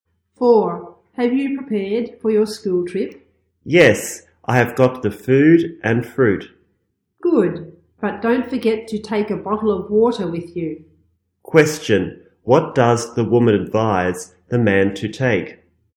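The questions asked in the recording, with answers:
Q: What does the woman advise the man to take?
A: A bottle of water.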